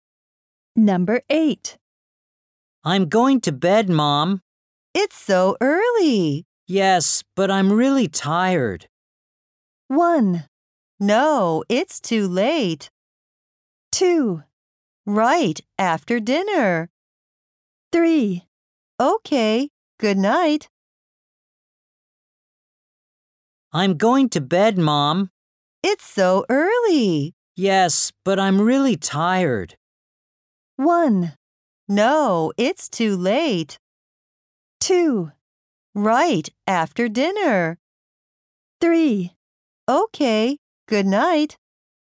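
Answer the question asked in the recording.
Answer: 3: Okay, good night.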